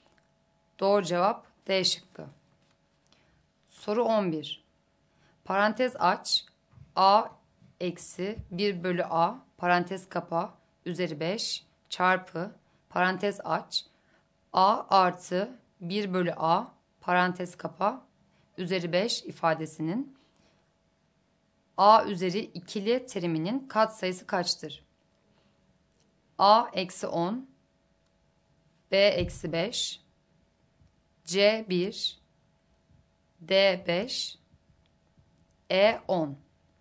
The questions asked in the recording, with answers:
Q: A artı 1 bölü A parantez kapa üzeri 5 ifadesinin A üzeri ikili teriminin katsayısı kaçtır?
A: Doğru cevap E şıkkı.